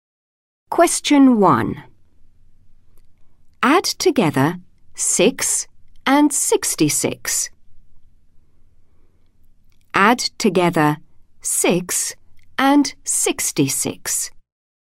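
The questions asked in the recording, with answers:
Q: Add together 6 and 66.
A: 72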